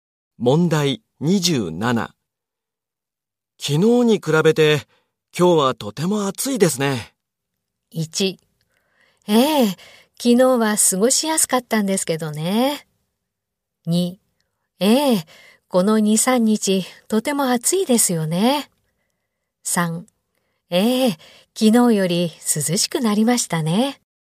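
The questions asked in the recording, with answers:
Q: 昨日に比べて、今日はとても暑いですね。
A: 1: ええ、昨日は過ごしやすかったんですけどね。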